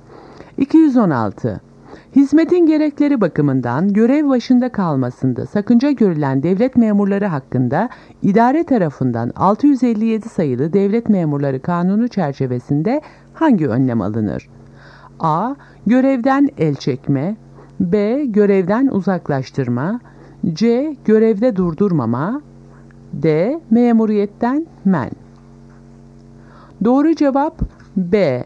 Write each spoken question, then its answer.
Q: Hizmetin gerekleri bakımından görev başında kalmasında sakınca görülen devlet memurları hakkında idare tarafından 657 sayılı Devlet Memurları Kanunu çerçevesinde hangi önlem alınır?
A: Doğru cevap B. Görevden uzaklaştırma.